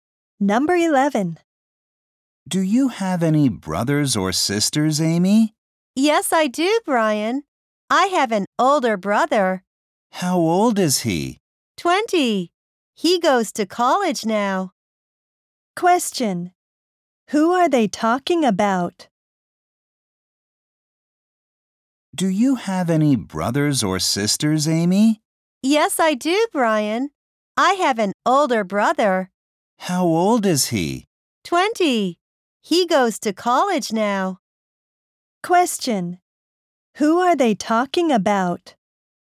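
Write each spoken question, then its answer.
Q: Who are they talking about?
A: Amy's older brother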